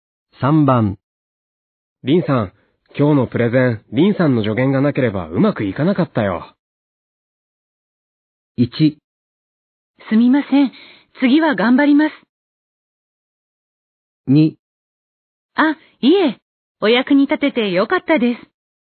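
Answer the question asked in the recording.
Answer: 2: あ、いえ。お役に立ててよかったです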